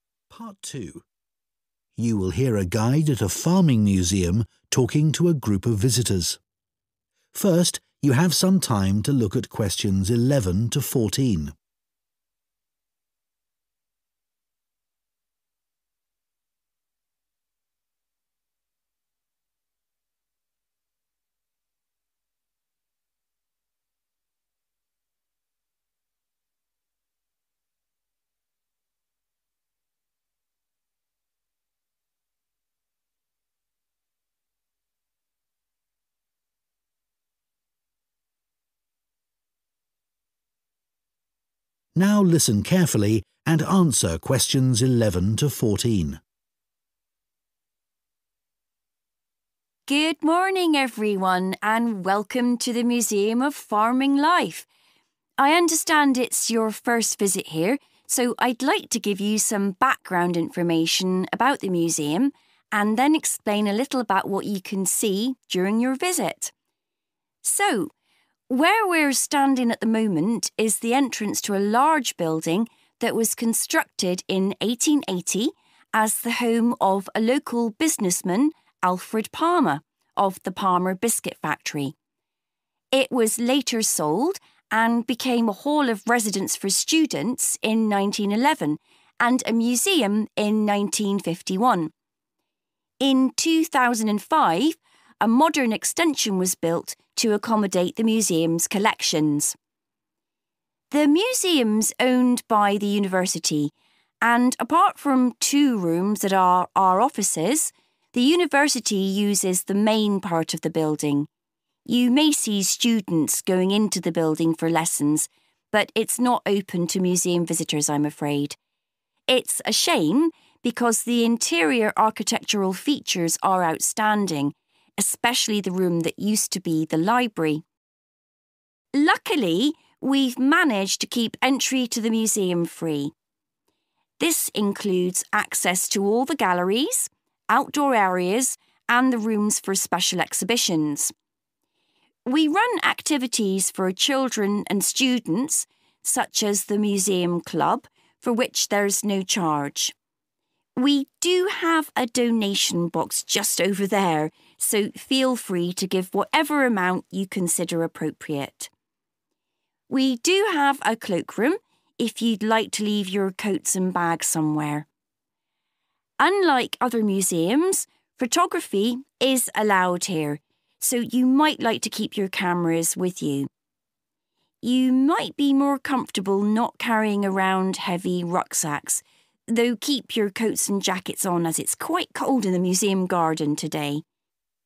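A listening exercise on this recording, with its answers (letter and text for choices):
Choose the correct letter, A, B or C.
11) The museum building was originally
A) a factory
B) private home.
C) hall of residence.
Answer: B) private home.

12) The university uses part of the museum building as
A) teaching rooms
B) a research library.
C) administration offices.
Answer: A) teaching rooms

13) What does the guide say about the entrance fee?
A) Visitors decide whether or not they wish to pay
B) Only children and students receive a discount.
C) The museum charges extra for special exhibitions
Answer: A) Visitors decide whether or not they wish to pay

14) What are visitors advised to leave in the cloakroom?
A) cameras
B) coats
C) bags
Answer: C) bags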